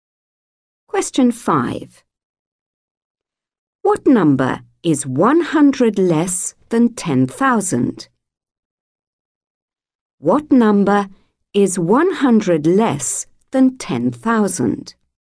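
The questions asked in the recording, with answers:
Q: What number is 100 less than 10,000?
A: 9,900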